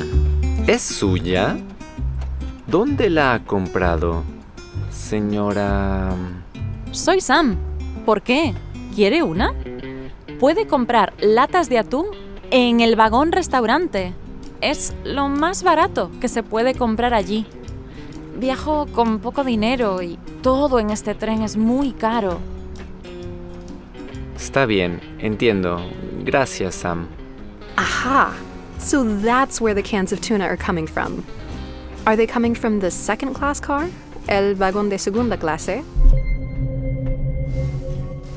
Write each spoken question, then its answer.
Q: Are they coming from the second class car?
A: No, they're coming from el vagón restaurante, from the dining car.